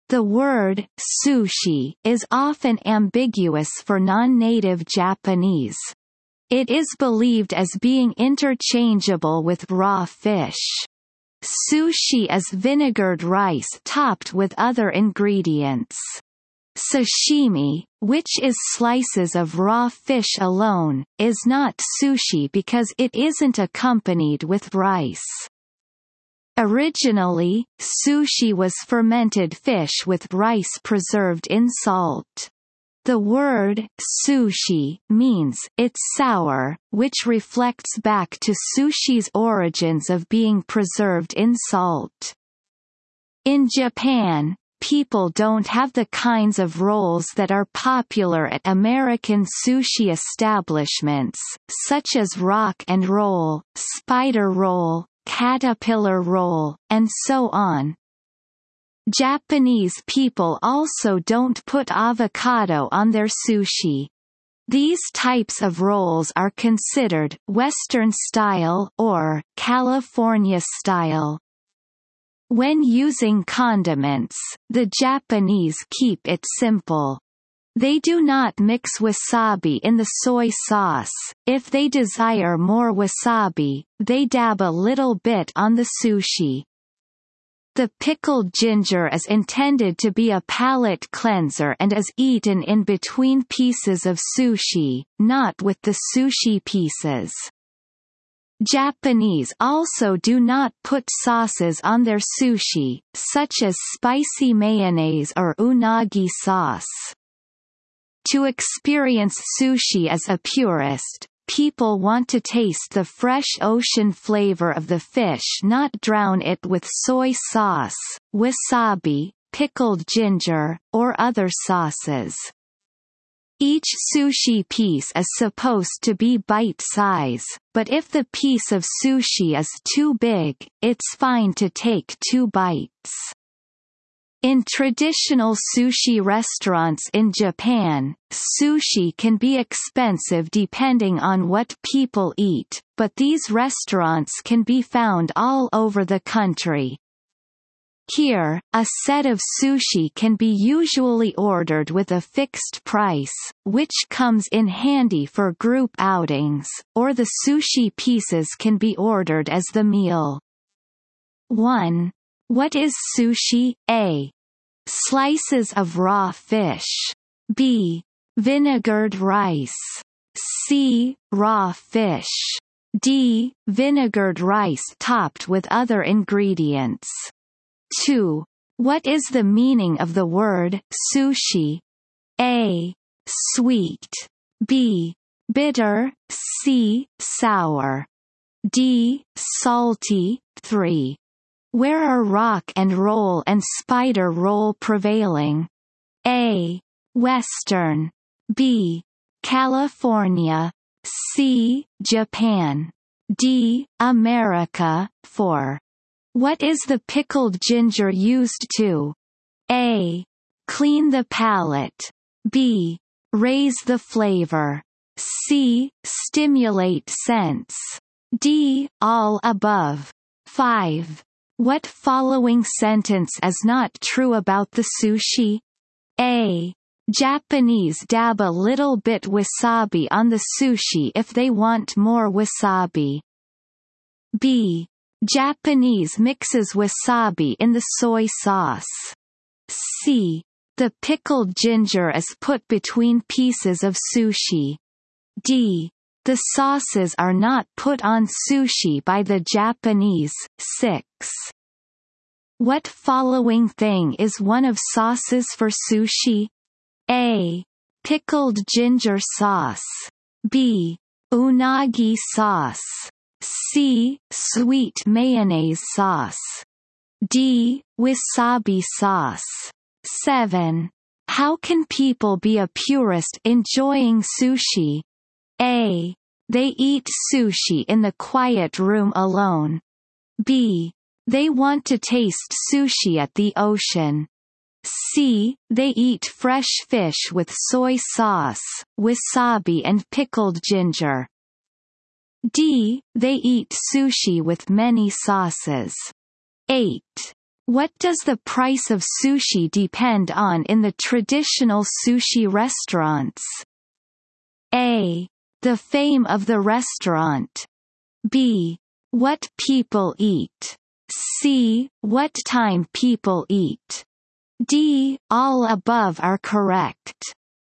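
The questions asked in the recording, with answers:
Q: What is sushi?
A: D: Vinegared rice topped with other ingredients.

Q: What is the meaning of the word sushi?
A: C: Sour.

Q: Where are rock and roll and spider roll prevailing?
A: D: America.

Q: What is the pickled ginger used to?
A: A: Clean the palate.

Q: What following sentence is not true about the sushi?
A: B: Japanese mixes wasabi in the soy sauce.

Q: What following thing is one of sauces for sushi?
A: B: Unagi sauce.

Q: What does the price of sushi depend on in the traditional sushi restaurants?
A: B: What people eat.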